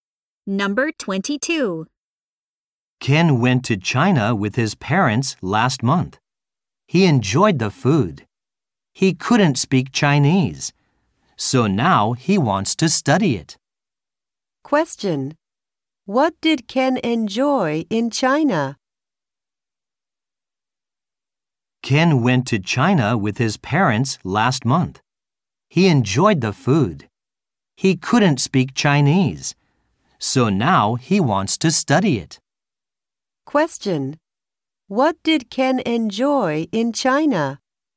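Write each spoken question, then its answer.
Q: What did Ken enjoy in China?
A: The food.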